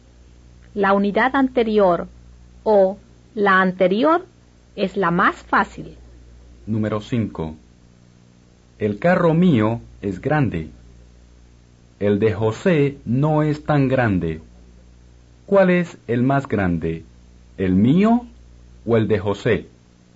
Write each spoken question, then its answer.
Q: ¿Cuál es el más grande? ¿El mío o el de José?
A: El suyo es el más grande.